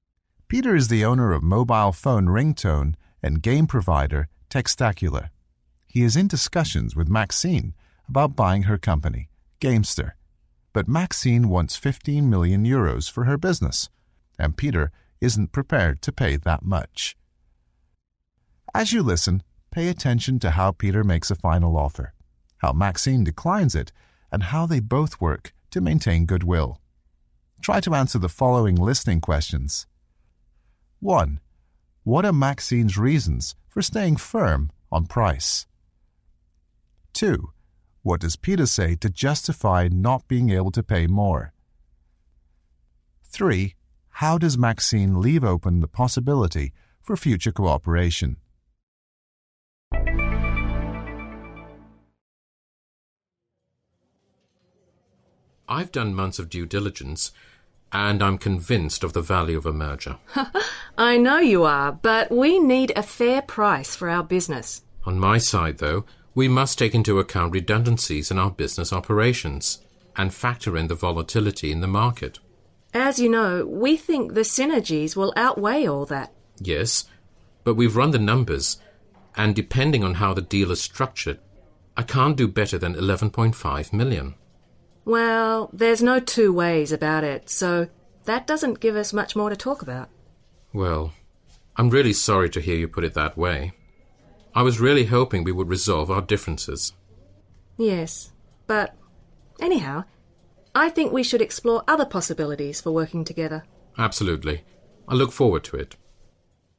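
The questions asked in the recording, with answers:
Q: What are Maxine's reasons for staying firm on price?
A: She needs a fair price for her business, and she thinks the synergies of a merger will outweigh Peter's concerns.

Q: What does Peter say to justify not being able to pay more?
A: He has to take into account redundancies in their business operations and the volatility in the market.

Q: How does Maxine leave open the possibility for future cooperation?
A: She suggests they explore other possibilities for working together.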